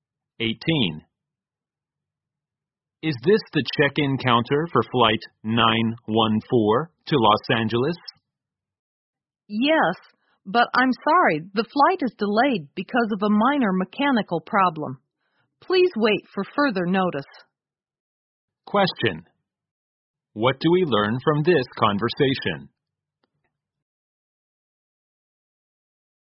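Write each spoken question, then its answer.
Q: What do we learn from this conversation?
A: Flight 914 to Los Angeles is delayed because of a minor mechanical problem.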